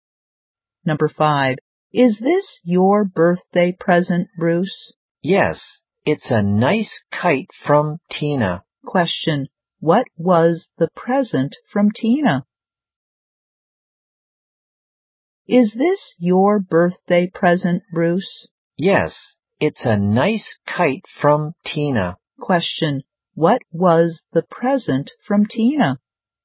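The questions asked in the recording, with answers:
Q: Question, what was the present from Tina?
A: A kite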